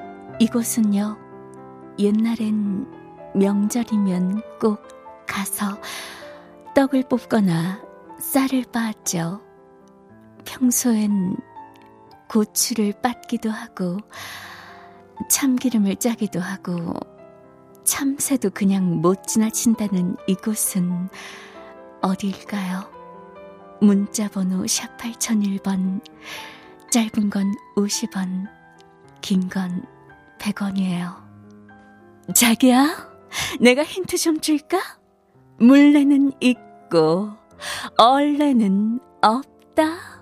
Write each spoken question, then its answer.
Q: 평소엔 고추를 빻기도 하고 참기름을 짜기도 하고 참새도 그냥 못 지나친다는 이곳은 어딜까요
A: 정답은 방앗간이에요.